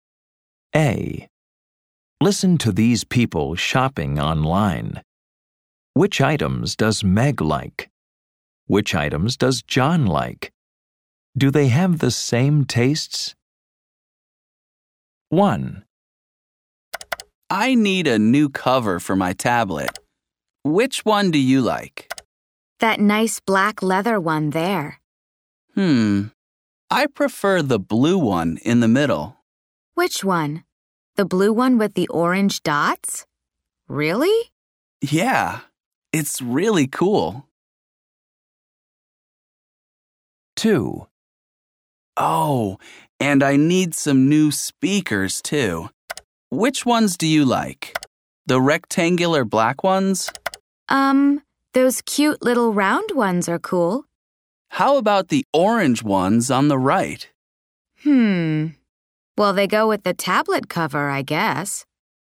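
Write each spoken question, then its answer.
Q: Do they have the same tastes?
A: No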